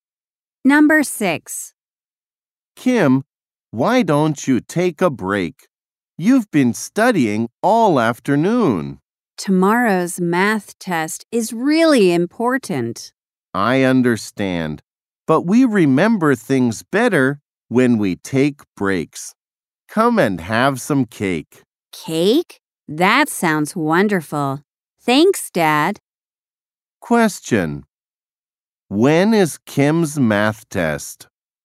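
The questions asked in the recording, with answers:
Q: When is Kim's math test?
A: Tomorrow.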